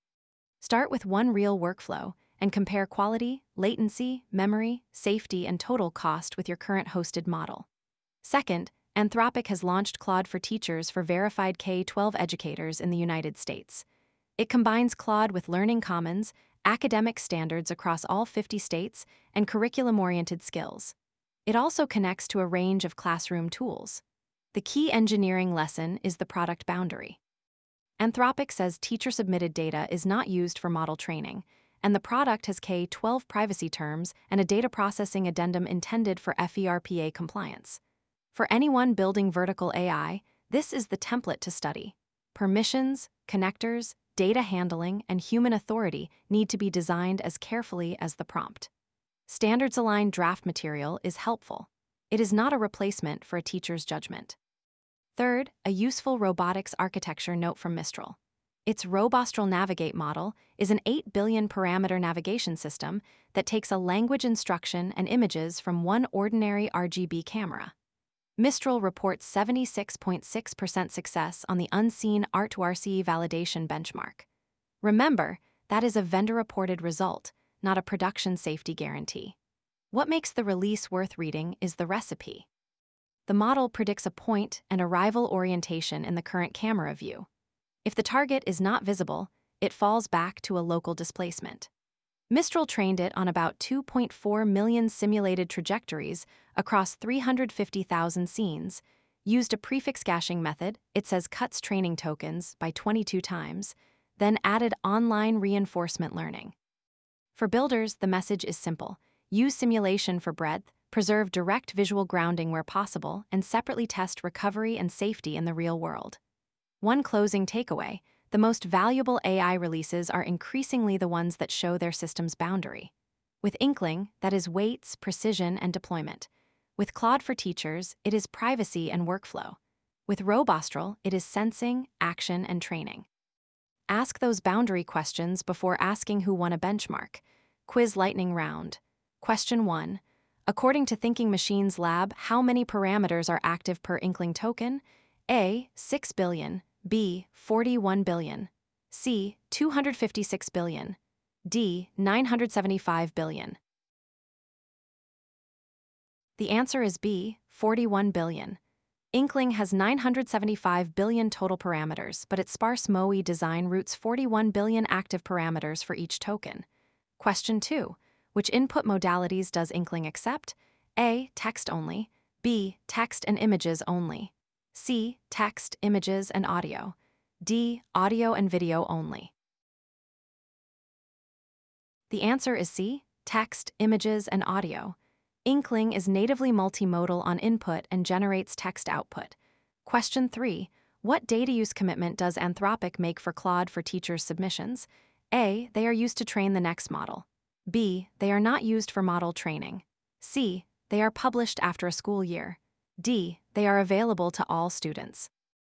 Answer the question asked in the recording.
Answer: The answer is B. They are not used for model training.